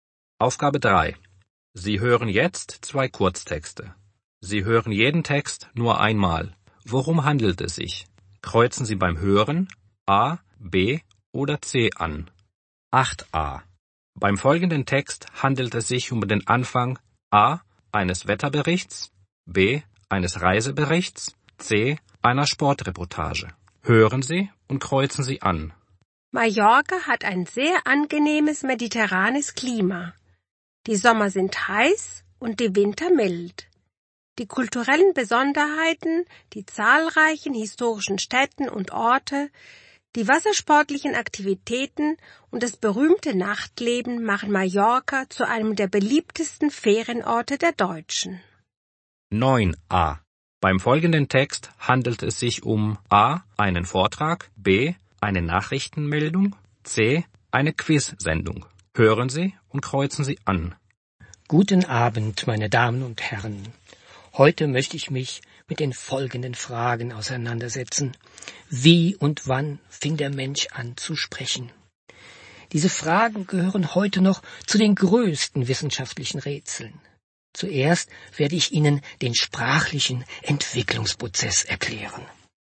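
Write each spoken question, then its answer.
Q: Beim folgenden Text handelt es sich um den Anfang A eines Wetterberichts, B eines Reiseberichts, C einer Sportreportage.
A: B: eines Reiseberichts

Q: Beim folgenden Text handelt es sich um A.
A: A: einen Vortrag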